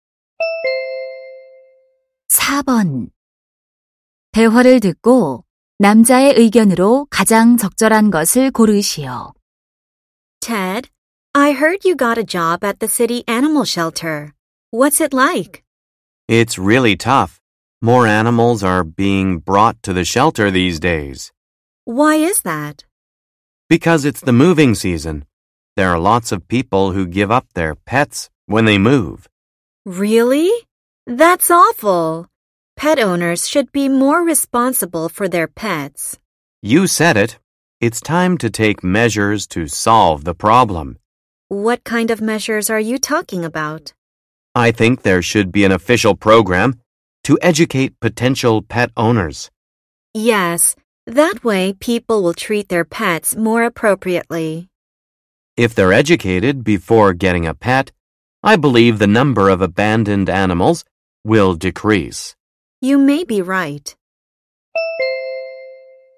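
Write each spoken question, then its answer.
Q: 대화를 듣고 남자의 의견으로 가장 적절한 것을 고르시오.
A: 예비 반려동물 주인을 교육하는 공식 프로그램이 필요하다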